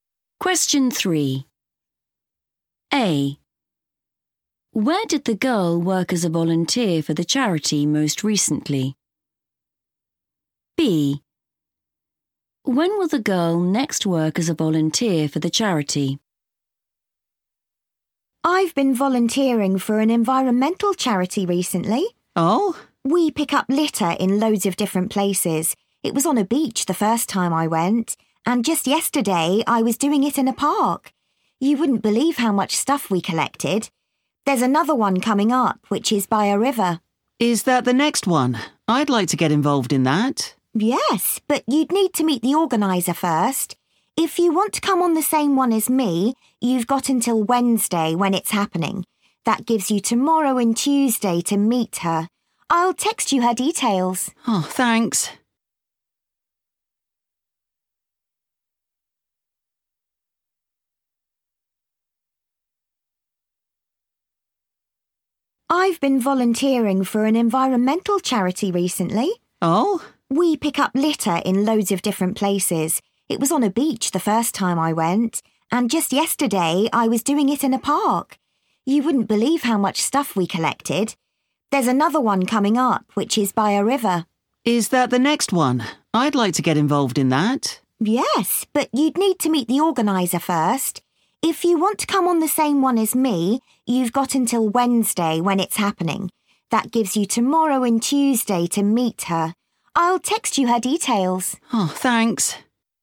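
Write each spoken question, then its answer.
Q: Where did the girl work as a volunteer for the charity most recently?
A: in a park

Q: When will the girl next work as a volunteer for the charity?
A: Wednesday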